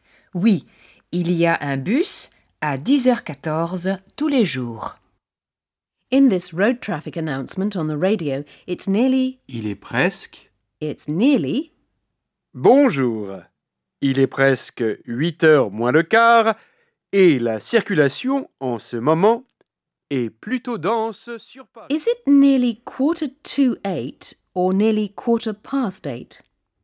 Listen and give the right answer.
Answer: It's nearly 7:45.